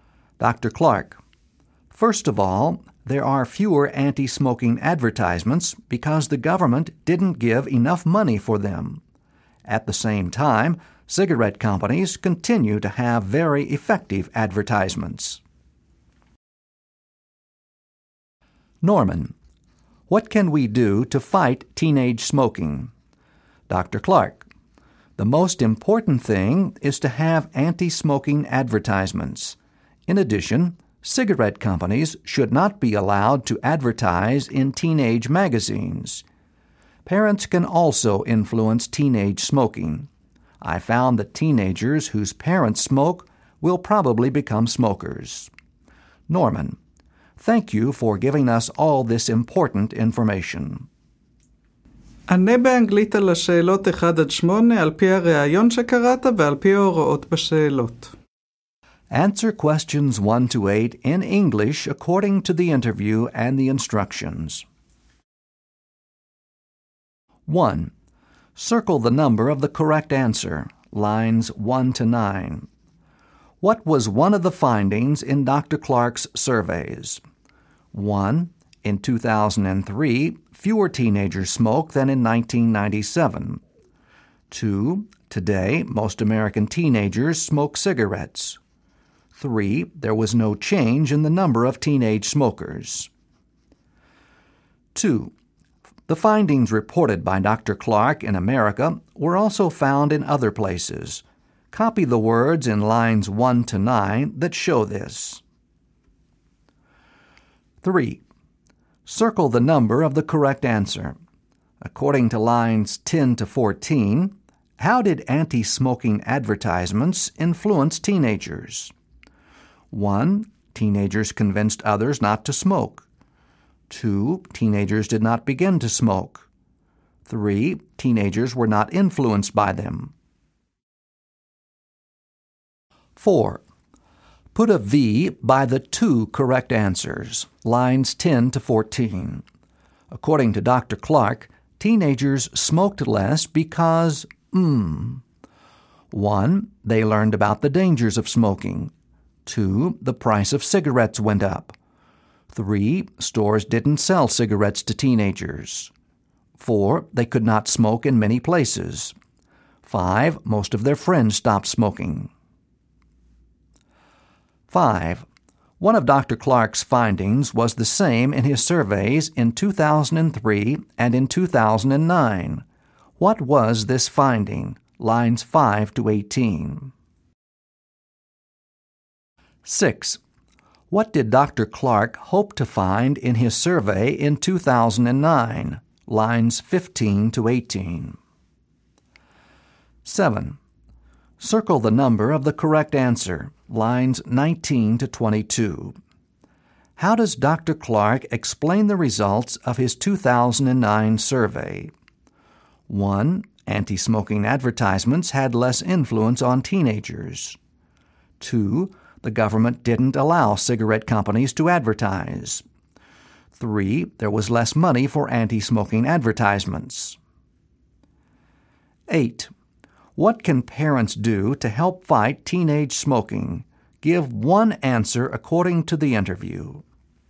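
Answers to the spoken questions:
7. 3: There was less money for anti-smoking advertisements.
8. Parents can stop smoking, because teenagers whose parents smoke will probably become smokers.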